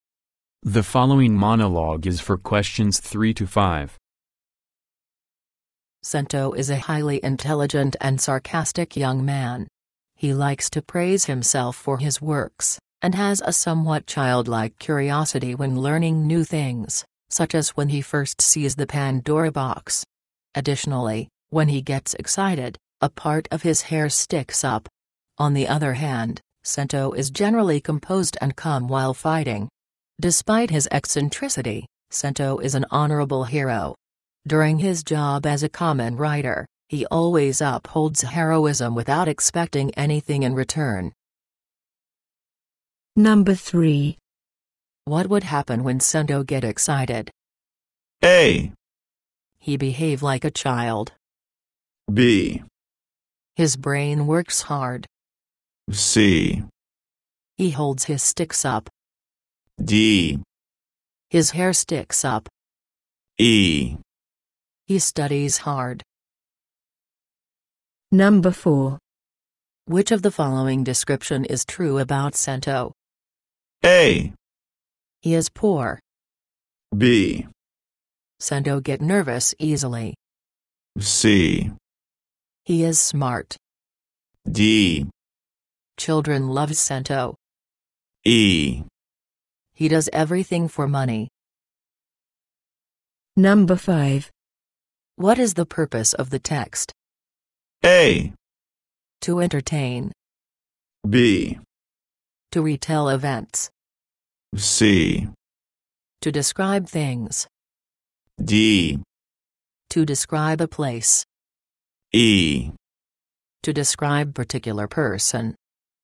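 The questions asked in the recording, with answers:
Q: What would happen when Cento get excited?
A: D: His hair sticks up.

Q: Which of the following description is true about Cento?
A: C: He is smart.

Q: What is the purpose of the text?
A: E: To describe particular person.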